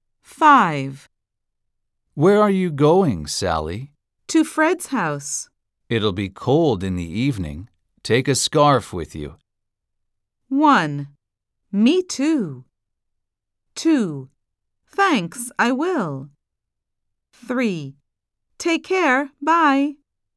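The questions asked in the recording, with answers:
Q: Take a scarf with you.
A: 2: Thanks, I will.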